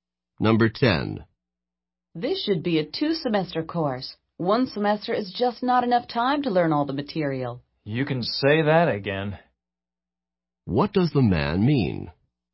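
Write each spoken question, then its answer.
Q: What does the man mean?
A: He agrees that the course should last two semesters.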